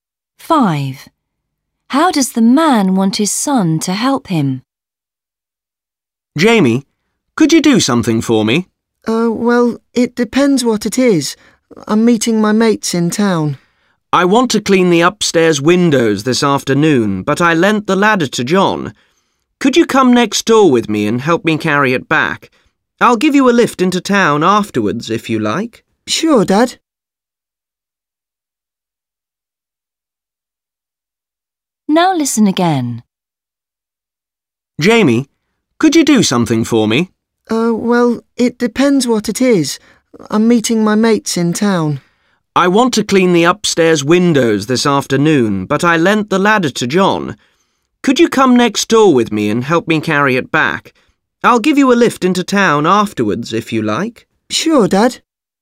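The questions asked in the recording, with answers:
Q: How does the man want his son to help him?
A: help carry the ladder back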